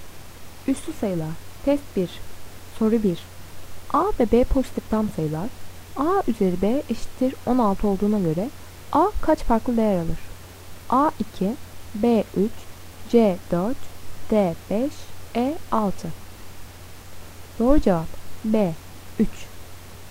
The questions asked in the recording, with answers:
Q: A üzeri B eşittir 16 olduğuna göre A kaç farklı değer alır?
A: Doğru cevap B 3.